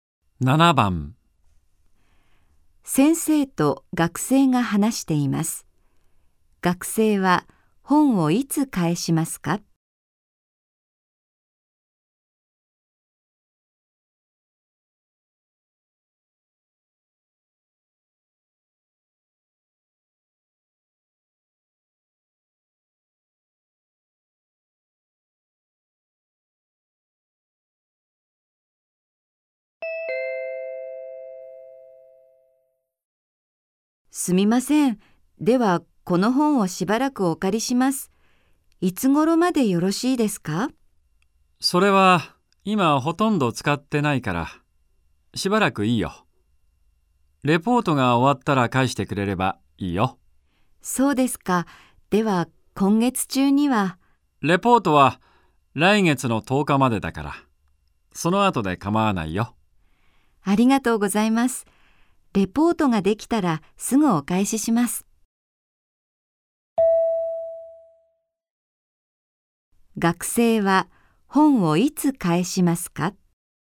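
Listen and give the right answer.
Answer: レポートができたらすぐ(来月10日のレポート締め切りの頃)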